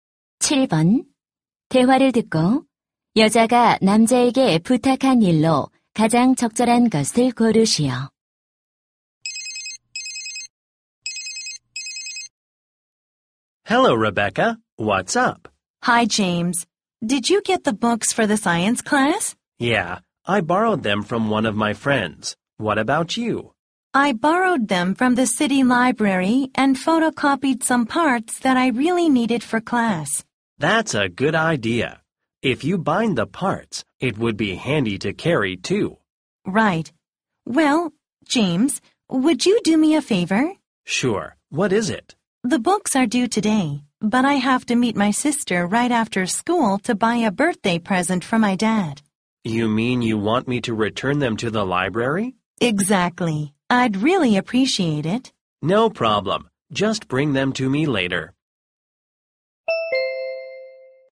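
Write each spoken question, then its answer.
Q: 대화를 듣고 여자가 남자에게 부탁한 일로 가장 적절한 것을 고르시오.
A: 도서관에 책 반납하기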